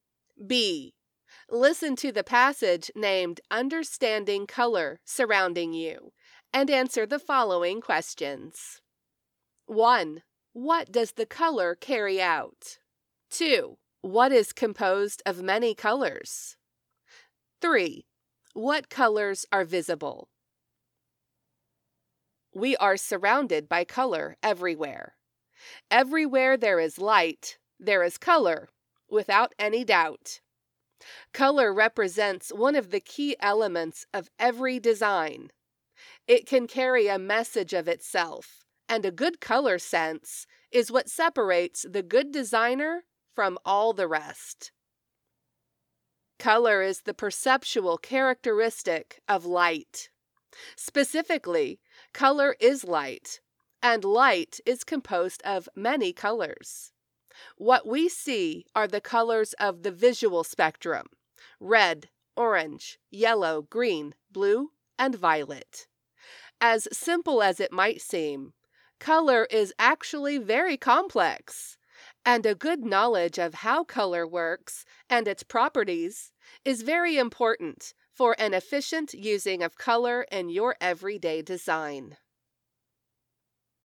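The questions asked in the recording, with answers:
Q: What does the color carry out?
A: A message of itself

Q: What is composed of many colors?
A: Light

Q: What colors are visible?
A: The colors of the visual spectrum: red, orange, yellow, green, blue, and violet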